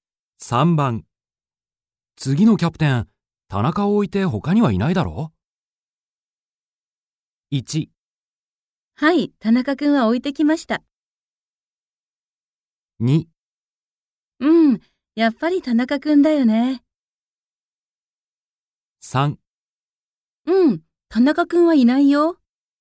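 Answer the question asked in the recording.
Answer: 2: うん、やっぱり田中君だよね。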